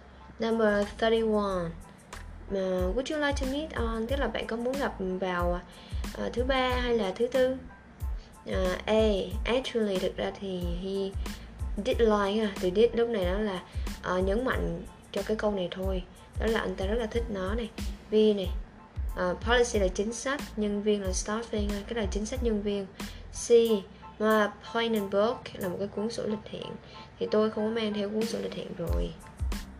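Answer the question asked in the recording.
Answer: C: Tôi không có mang theo cuốn sổ lịch hẹn.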